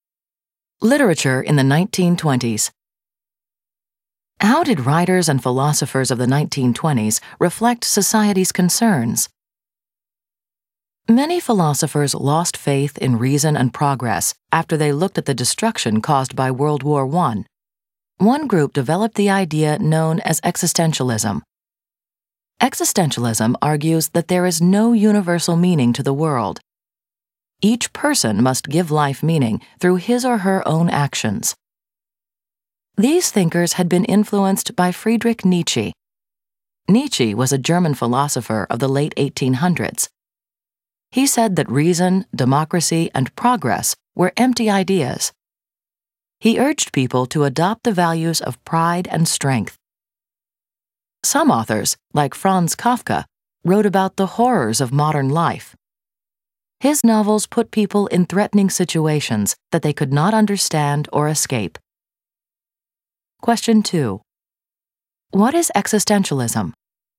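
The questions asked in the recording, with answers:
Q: What is existentialism?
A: The idea that there is no universal meaning to the world; each person must give life meaning through his or her own actions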